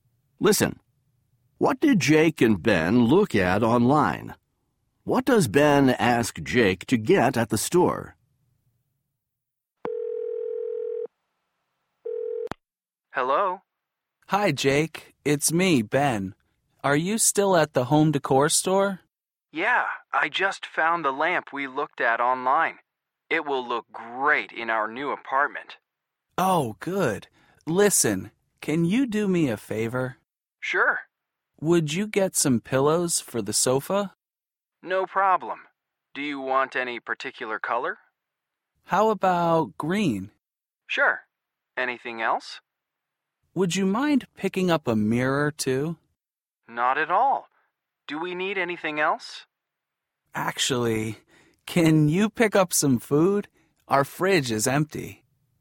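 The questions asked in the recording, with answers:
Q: What did Jake and Ben look at online?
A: A lamp

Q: What does Ben ask Jake to get at the store?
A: Pillows for the sofa and a mirror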